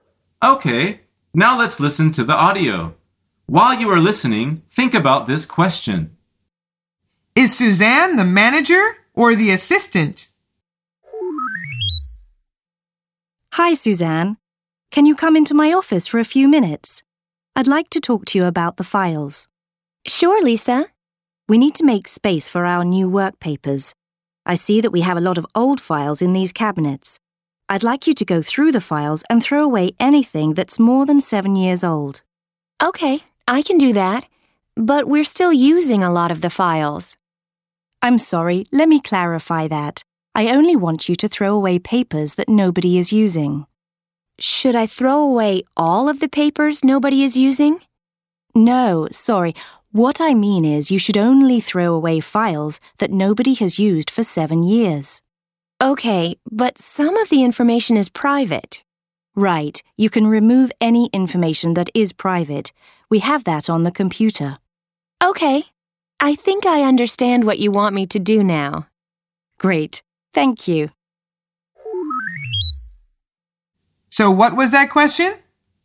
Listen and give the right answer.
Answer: The answer is the assistant.